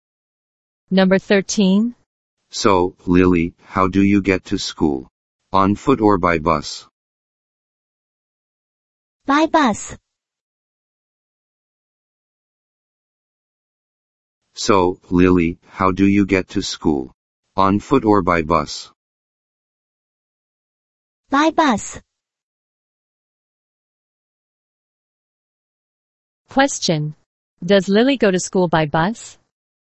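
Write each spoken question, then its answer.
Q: Question. Does Lily go to school by bus?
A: Yes, she does.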